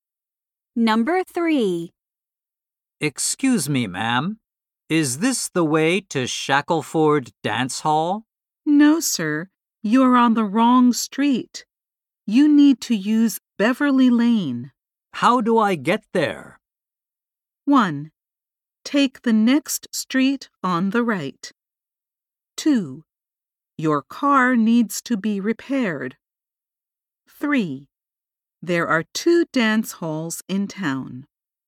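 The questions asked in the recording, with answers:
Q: How do I get there?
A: 1: Take the next street on the right.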